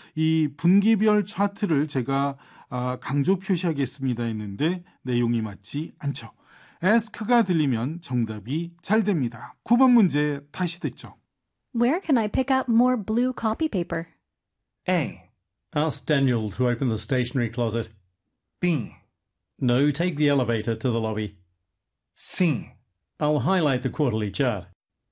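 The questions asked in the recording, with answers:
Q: Where can I pick up more blue copy paper?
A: A: Ask Daniel to open the stationery closet.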